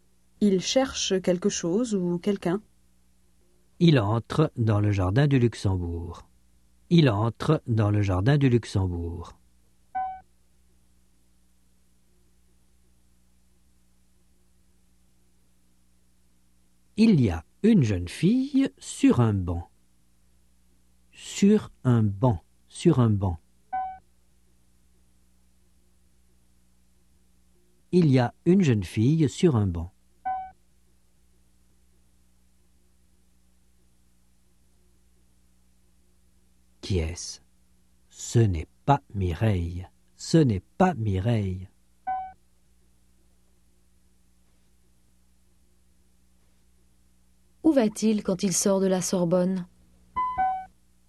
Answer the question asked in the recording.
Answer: Au Luxembourg.